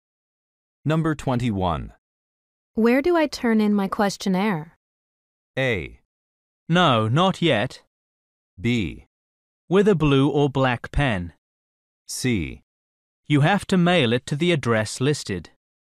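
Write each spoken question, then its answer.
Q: Where do I turn in my questionnaire?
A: C: You have to mail it to the address listed.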